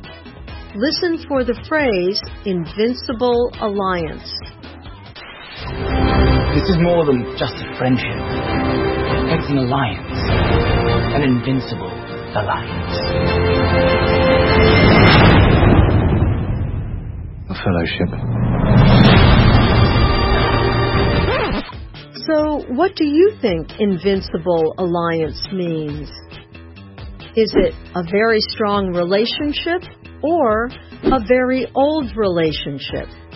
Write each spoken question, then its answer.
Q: So, what do you think Invincible Alliance means?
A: An invisible alliance means a very strong relationship.